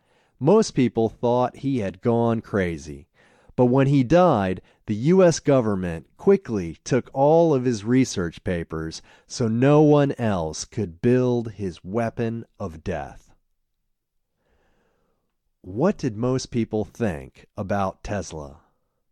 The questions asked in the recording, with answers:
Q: What did most people think about Tesla?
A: Most people thought he had gone crazy.